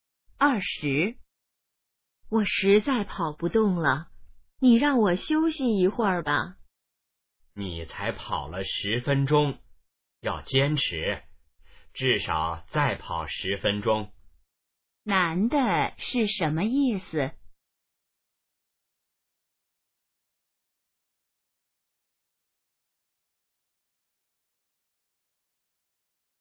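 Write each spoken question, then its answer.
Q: 男的是什么意思?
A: 要坚持,再跑10分钟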